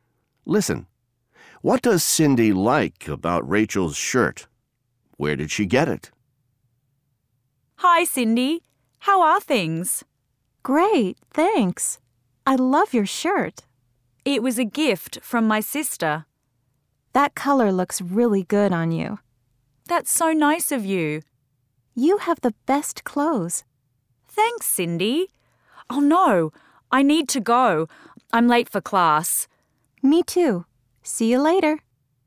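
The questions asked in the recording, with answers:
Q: What does Cindy like about Rachel's shirt?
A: The color looks really good on her

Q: Where did she get it?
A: It was a gift from her sister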